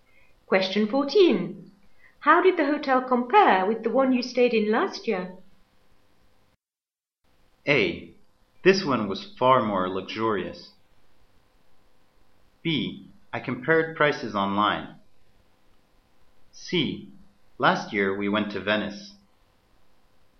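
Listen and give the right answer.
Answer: A: This one was far more luxurious.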